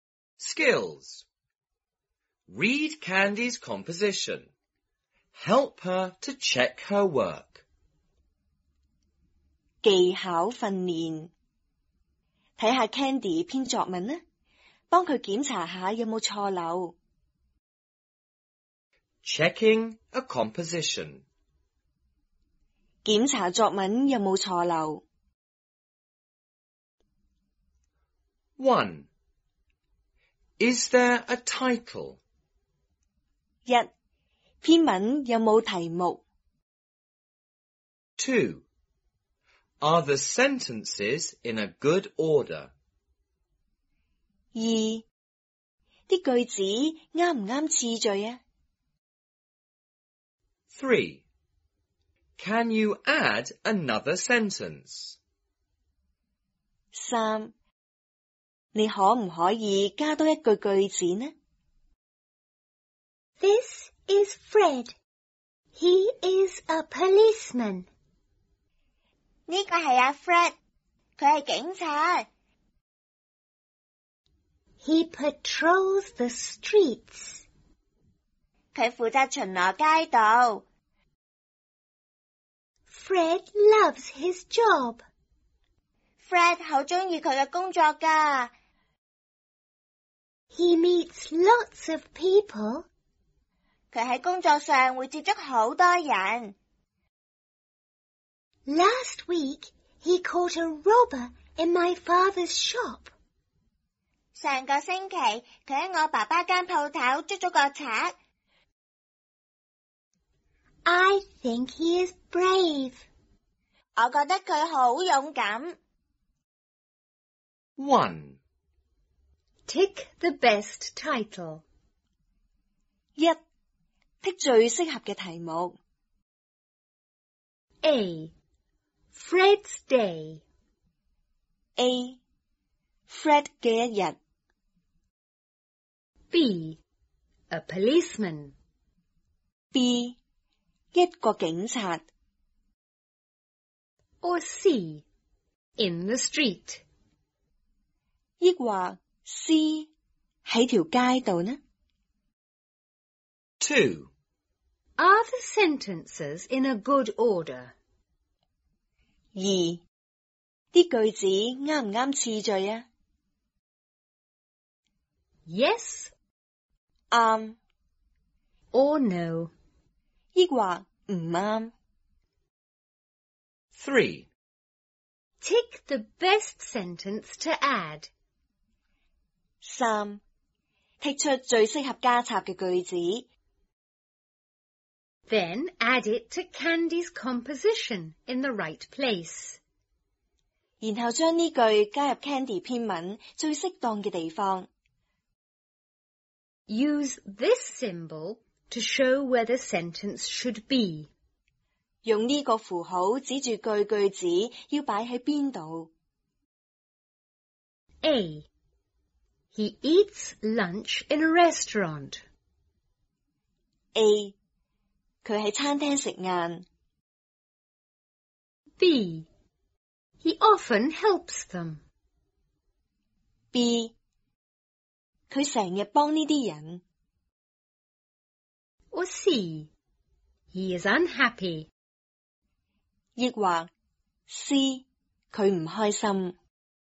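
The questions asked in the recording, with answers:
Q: Tick the best title.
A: B: A policeman.

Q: Tick the best sentence to add.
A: B: He often helps them.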